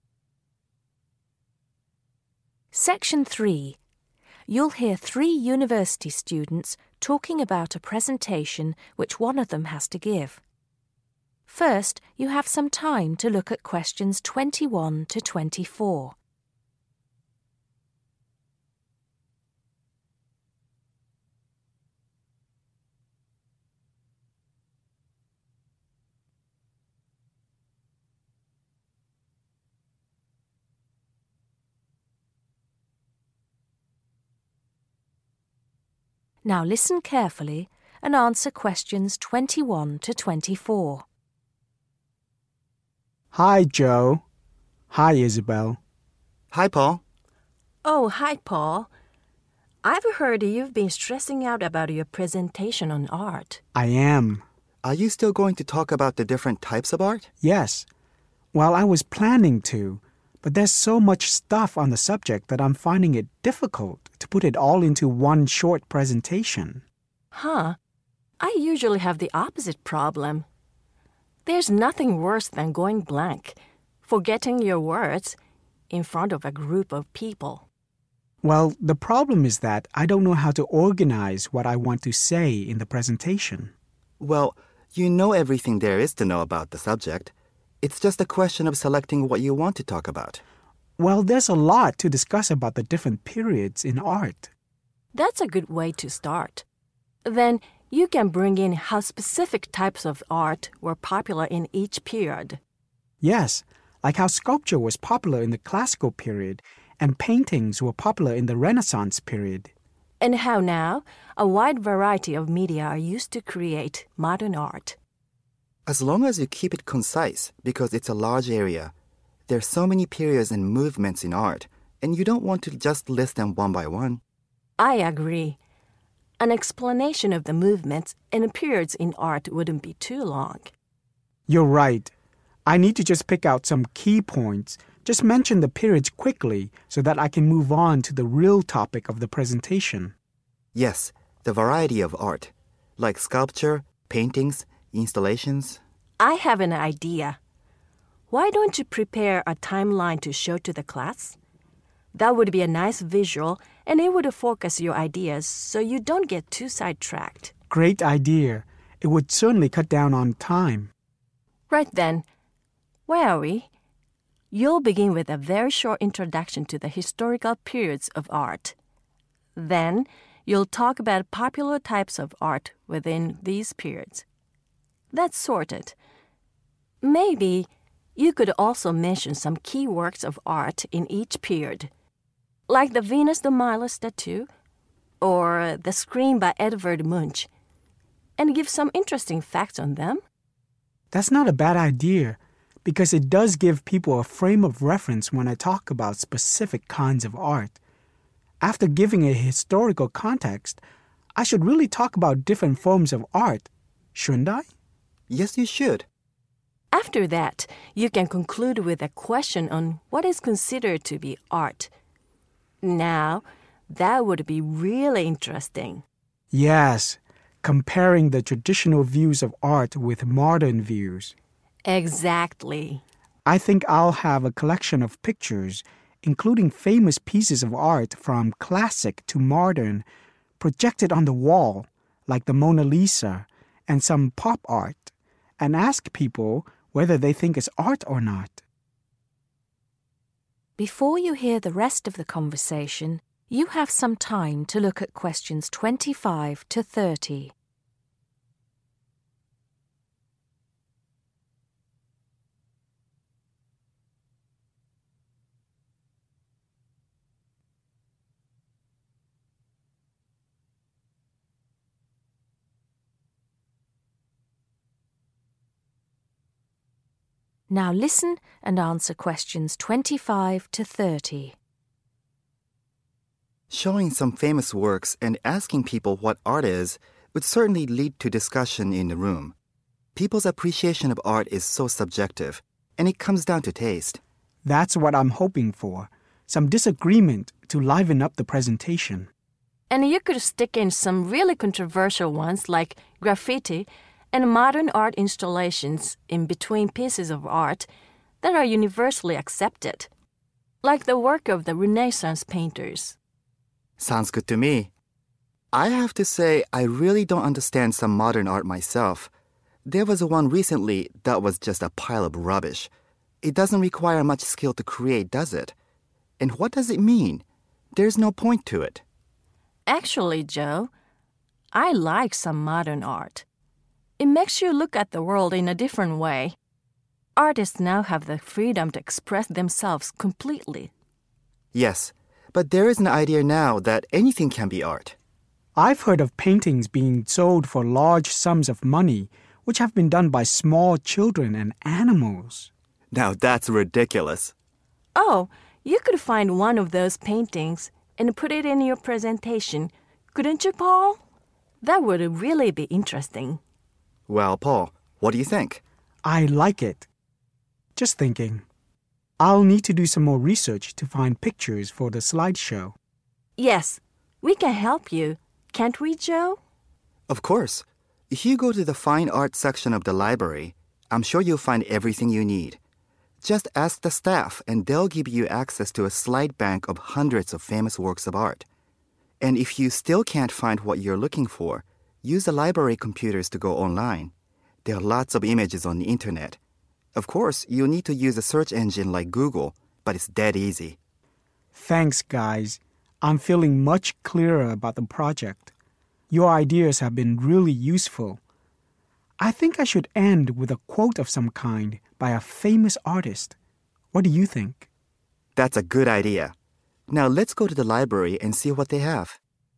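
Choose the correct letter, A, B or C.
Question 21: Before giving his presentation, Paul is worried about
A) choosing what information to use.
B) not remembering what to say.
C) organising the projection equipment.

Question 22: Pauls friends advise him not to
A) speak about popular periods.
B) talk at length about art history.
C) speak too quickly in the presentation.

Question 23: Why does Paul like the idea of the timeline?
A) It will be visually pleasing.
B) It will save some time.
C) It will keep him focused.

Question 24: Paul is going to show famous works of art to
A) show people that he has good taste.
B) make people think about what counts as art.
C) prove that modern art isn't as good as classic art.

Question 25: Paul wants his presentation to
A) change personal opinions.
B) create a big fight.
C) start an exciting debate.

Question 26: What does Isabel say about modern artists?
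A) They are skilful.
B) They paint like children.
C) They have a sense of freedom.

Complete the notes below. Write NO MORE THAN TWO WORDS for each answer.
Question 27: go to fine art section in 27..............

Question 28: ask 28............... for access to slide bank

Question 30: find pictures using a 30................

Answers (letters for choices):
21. A
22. B
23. B
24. B
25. C
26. C
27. library
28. staff
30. search engine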